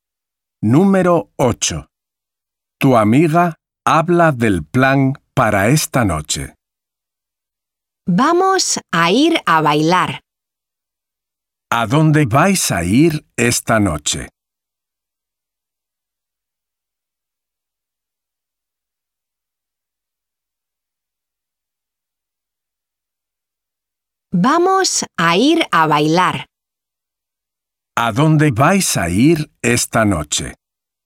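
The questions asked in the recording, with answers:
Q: ¿A dónde vais a ir esta noche?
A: a bailar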